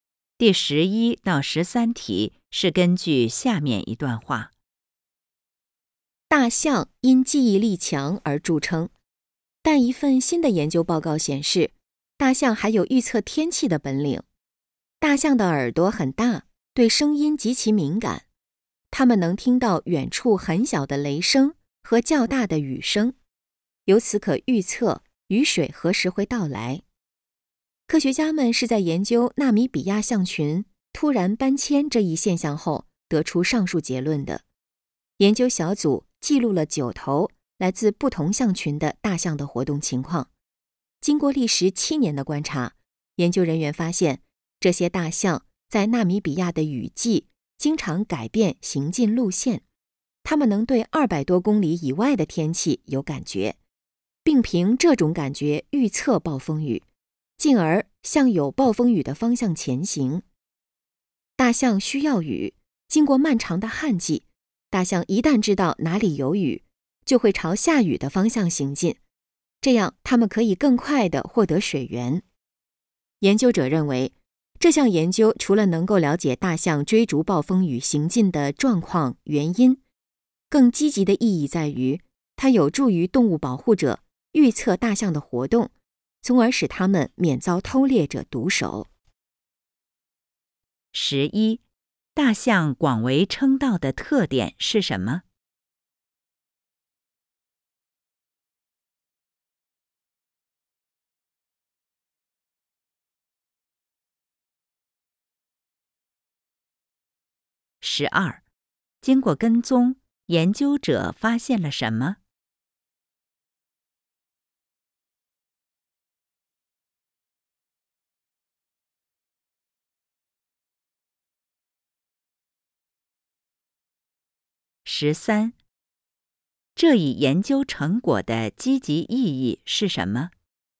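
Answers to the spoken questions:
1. 记忆力强
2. 大象能预测暴风雨,并向有暴风雨的方向前行
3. 有助于预测大象的活动,使它们免遭偷猎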